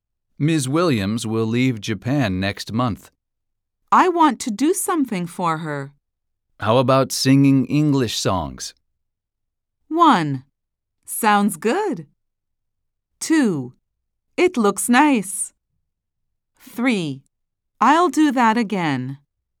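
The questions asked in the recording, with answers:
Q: How about singing English songs?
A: 1: Sounds good.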